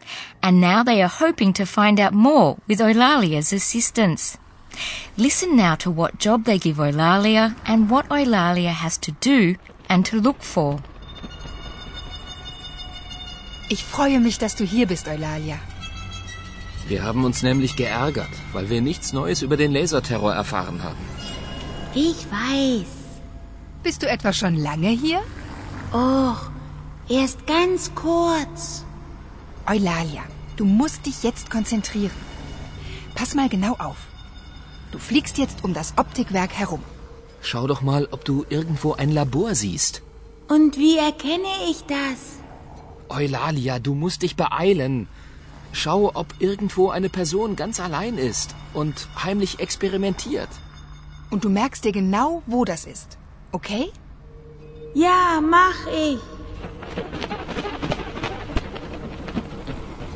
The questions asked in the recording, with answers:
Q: Listen now to what job they give Eulalia and what Eulalia has to do and to look for.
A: Eulalia is to fly around the optics factory.